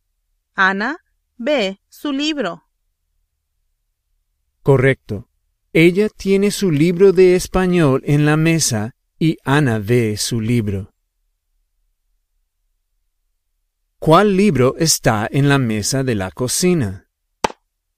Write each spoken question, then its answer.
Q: ¿Cuál libro está en la mesa de la cocina?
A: El libro de español de Ana.